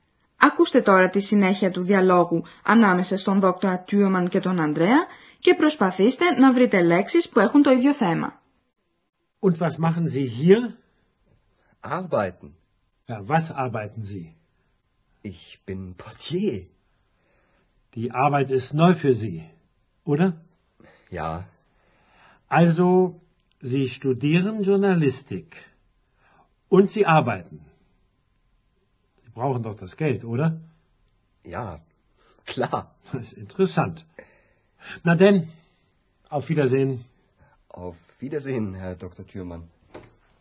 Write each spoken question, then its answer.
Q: Ακούστε τώρα τη συνέχεια του διαλόγου ανάμεσα στον δόκτωρα Τιούμαν και τον Ανδρέα και προσπαθήστε να βρείτε λέξεις που έχουν το ίδιο θέμα.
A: Οι δύο λέξεις με το ίδιο θέμα είναι το εργάζομαι και εργασία.